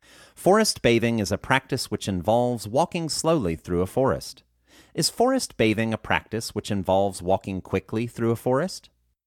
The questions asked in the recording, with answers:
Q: Is forest bathing a practice which involves walking quickly through a forest?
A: No, forest bathing is not a practice which involves walking quickly through a forest.